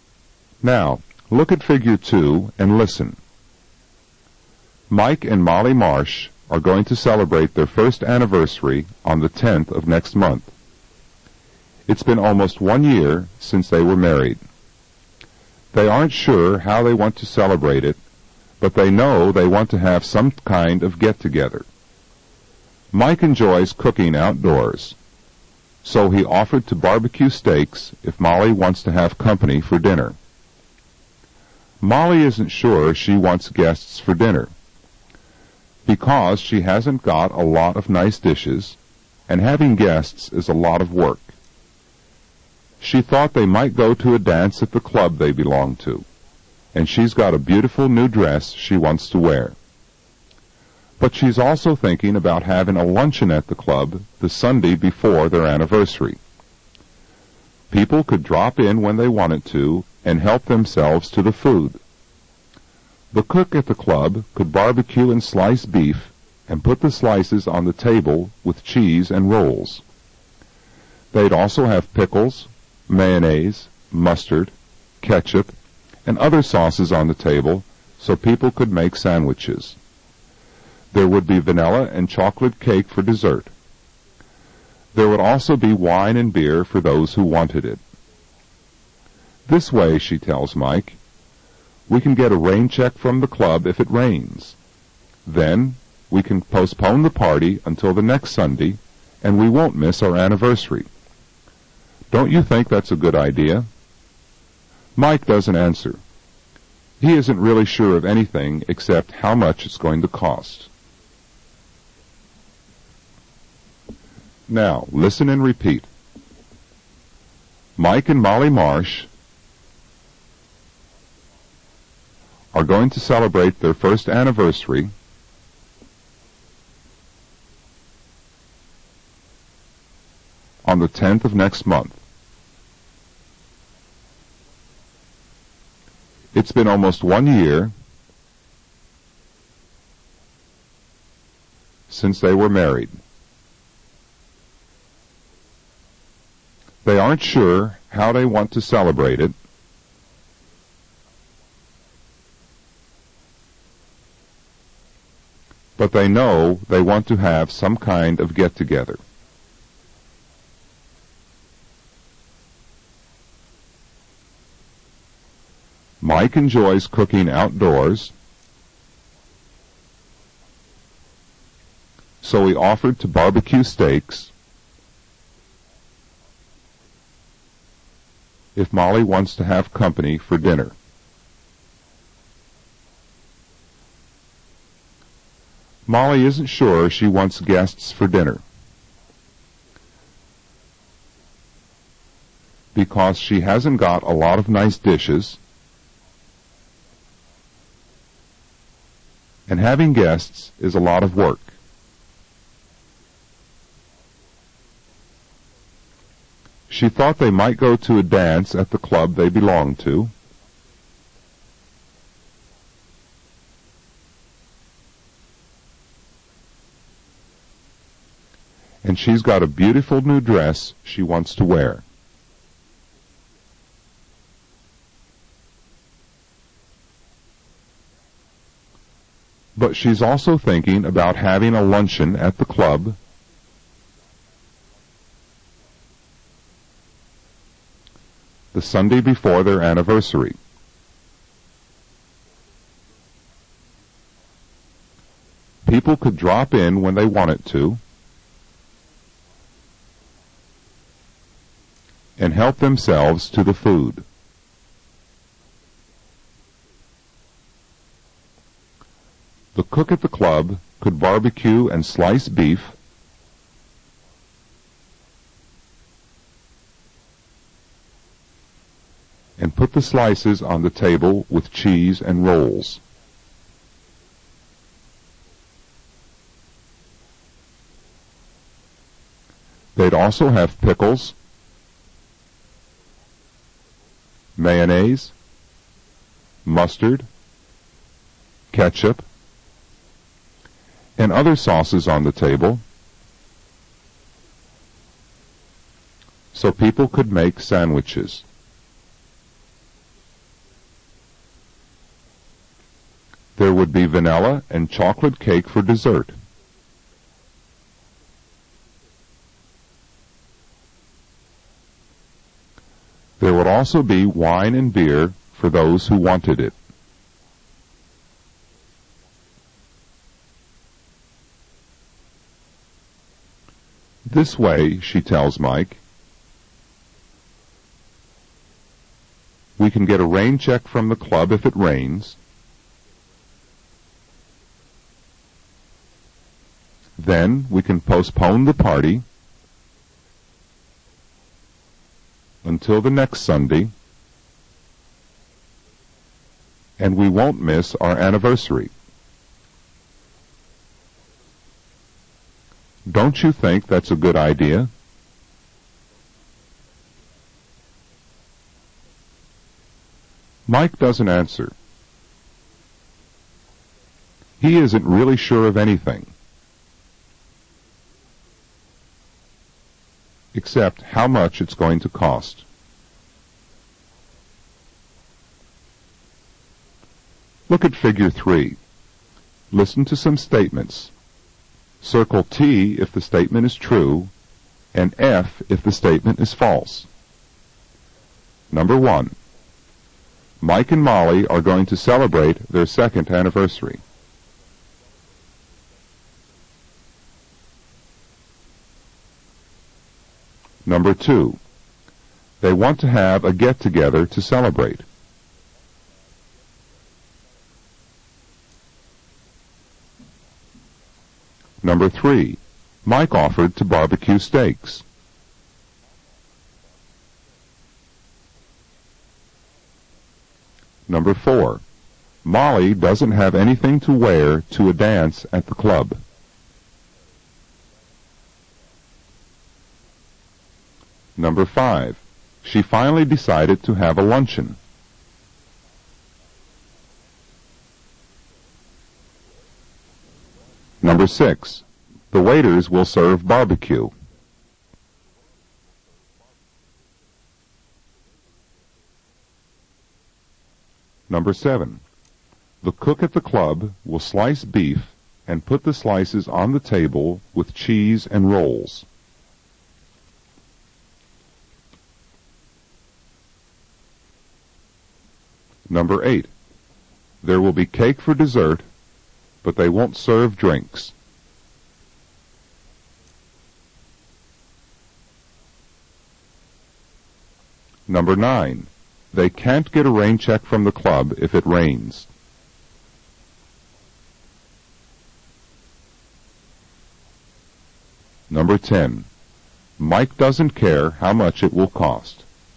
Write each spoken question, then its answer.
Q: Mike and Molly are going to celebrate their second anniversary.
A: Number 1 is false.

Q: They want to have a get-together to celebrate.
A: Number 2 is true.

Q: Mike offered to barbecue steaks.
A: Number 3 is true.

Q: Molly doesn't have anything to wear to a dance at the club.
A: Number 4 is false.

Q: The waiters will serve barbecue.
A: Number 6 is false.

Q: The cook at the club will slice beef and put the slices on the table with cheese and rolls.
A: Number 7 is true.

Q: There will be cake for dessert, but they won't serve drinks.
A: Number 8 is false.

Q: They can't get a rain check from the club if it rains.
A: Number 9 is false.

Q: Mike doesn't care how much it will cost.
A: Number 10 is false.